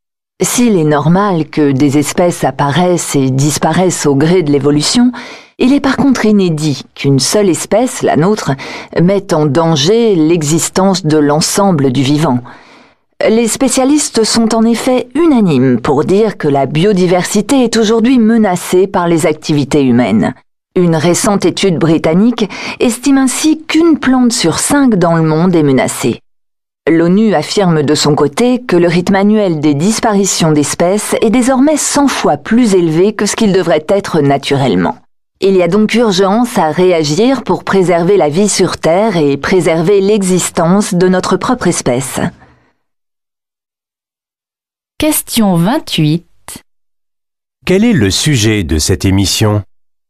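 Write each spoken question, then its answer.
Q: Quel est le sujet de cette émission ?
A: La menace que les activités humaines font peser sur la biodiversité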